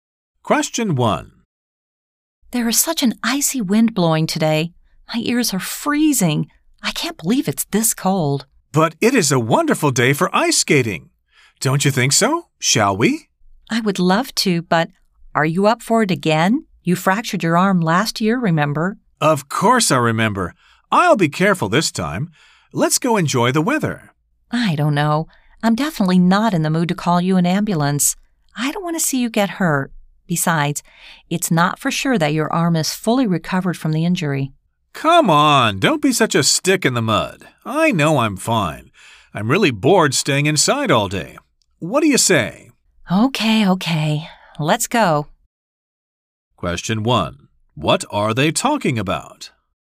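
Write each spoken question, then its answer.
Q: What are they talking about?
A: Going ice skating despite the cold and his past arm injury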